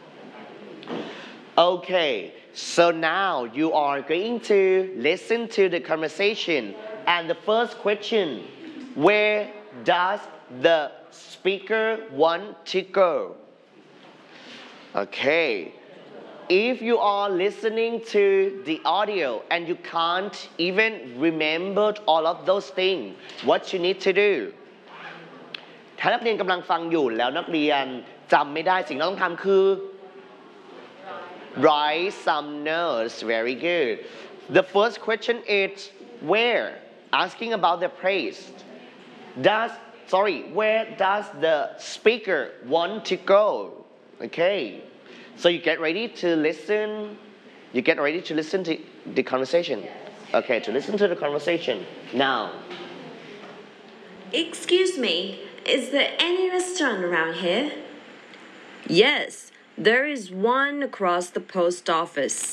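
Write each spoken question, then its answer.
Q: where does the speaker want to go?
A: A restaurant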